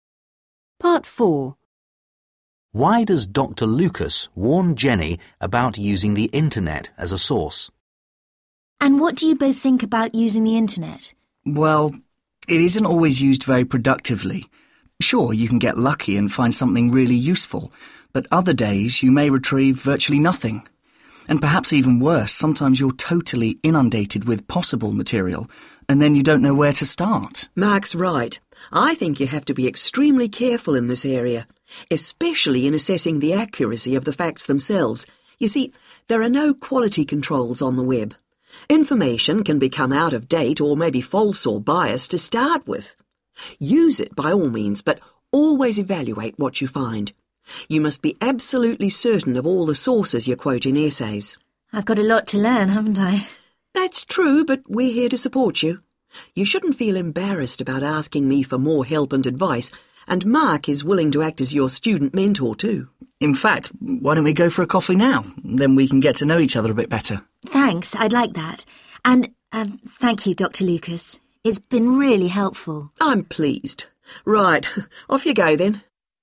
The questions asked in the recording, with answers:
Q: Why does Dr. Lucas warn Jenny about using the internet as a source?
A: Dr. Lucas explains to Jenny information on the internet isn't always reliable because it may be out of date, inaccurate, or biased.